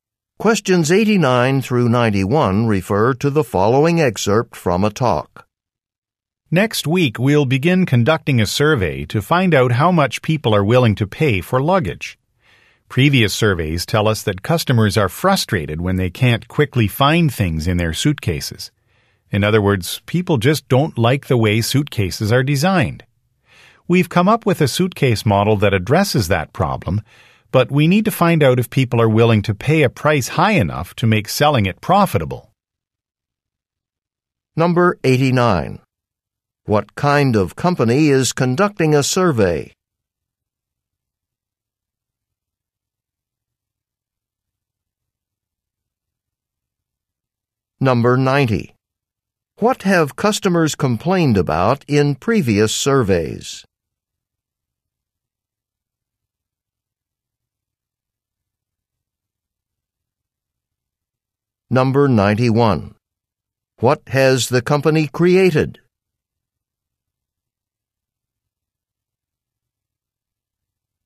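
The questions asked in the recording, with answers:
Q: What kind of company is conducting a survey?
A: A luggage company

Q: What have customers complained about in previous surveys?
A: They can't quickly find things in their suitcases

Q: What has the company created?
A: A new suitcase model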